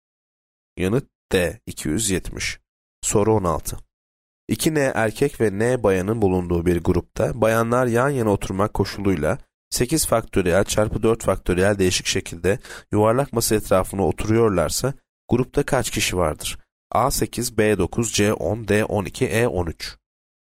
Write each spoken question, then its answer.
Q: 2N erkek ve N bayanın bulunduğu bir grupta bayanlar yan yana oturmak koşuluyla 8 faktöriyel çarpı 4 faktöriyel değişik şekilde yuvarlak masa etrafına oturuyorlarsa grupta kaç kişi vardır?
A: Yanıt D 12.